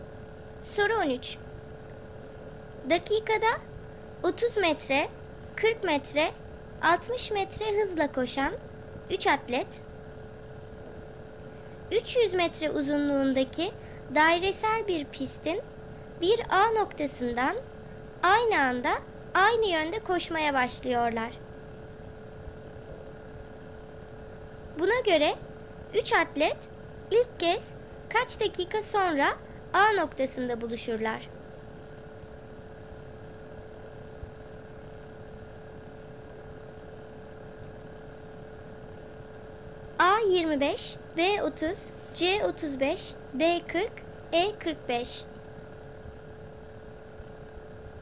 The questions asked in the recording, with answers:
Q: Buna göre 3 atlet ilk kez kaç dakika sonra A noktasında buluşurlar?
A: Doğru cevap B 30.